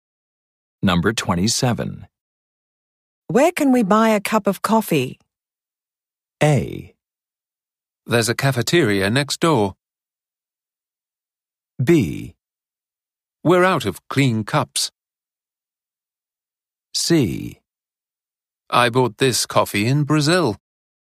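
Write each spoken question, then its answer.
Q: Where can we buy a cup of coffee?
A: A: There's a cafeteria next door.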